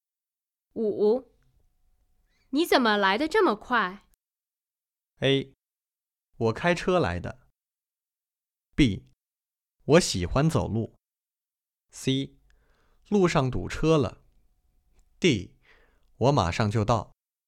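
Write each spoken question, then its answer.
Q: 你怎么来得这么快?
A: A: 我开车来的。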